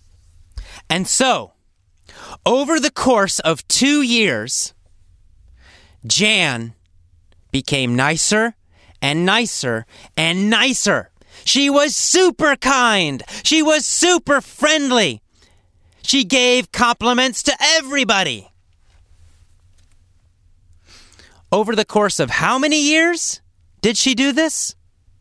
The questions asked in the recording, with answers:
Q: Over the course of how many years did she do this?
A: Well, over the course of 2 years.